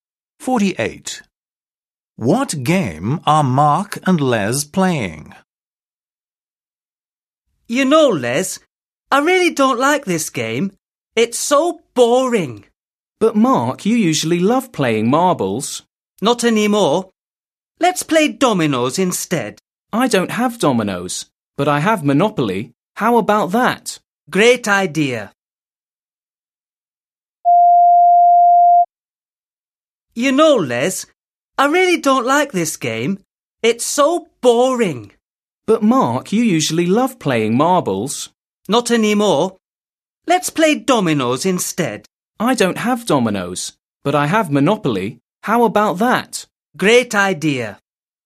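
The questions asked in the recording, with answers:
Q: What game are Mark and Les playing?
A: marbles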